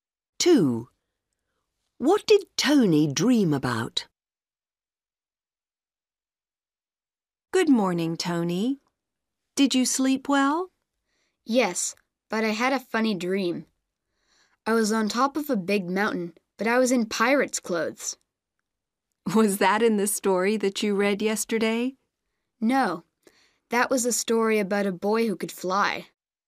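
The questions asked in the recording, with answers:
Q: What did Tony dream about?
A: Being on top of a big mountain in pirate's clothes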